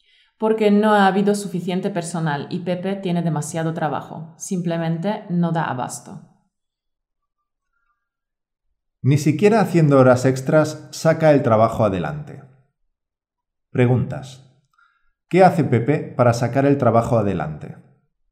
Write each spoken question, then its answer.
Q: ¿Qué hace Pepe para sacar el trabajo adelante?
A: Pepe trabaja horas extras para terminar todo el trabajo.